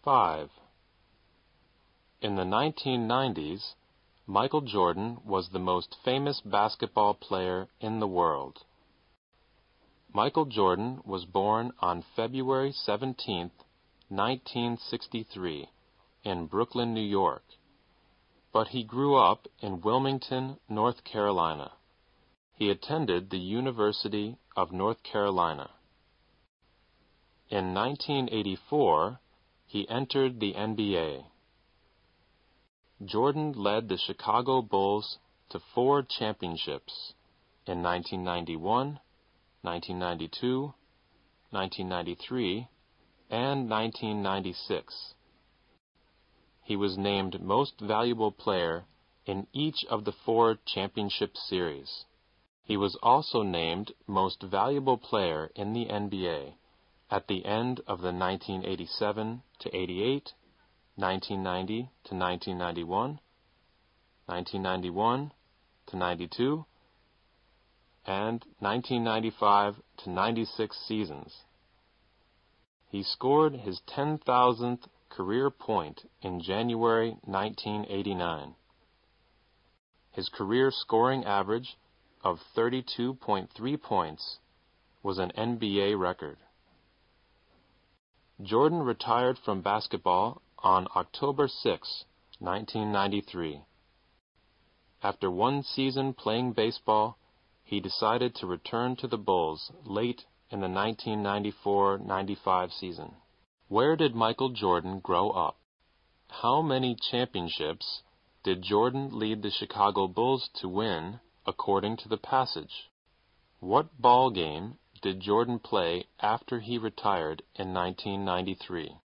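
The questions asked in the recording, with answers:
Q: Where did Michael Jordan grow up?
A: Wilmington, North Carolina

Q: What ball game did Jordan play after he retired in 1993?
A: Baseball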